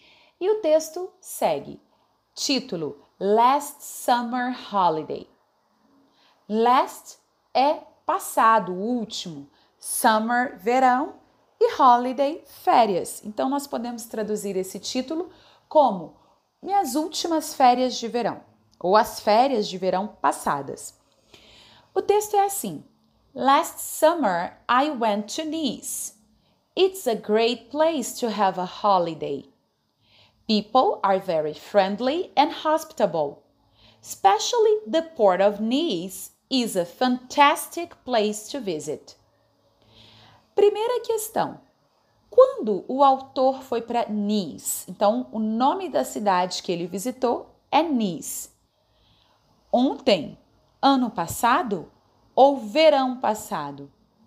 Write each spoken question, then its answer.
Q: Primeira questão: quando o autor foi para Nice?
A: Portanto, alternativa correta, letra C.